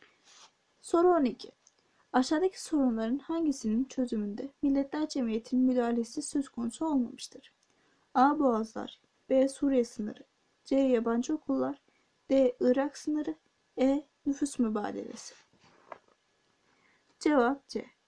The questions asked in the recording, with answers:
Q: Aşağıdaki sorunların hangisinin çözümünde Milletler Cemiyeti'nin müdahalesi söz konusu olmamıştır?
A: Cevap C.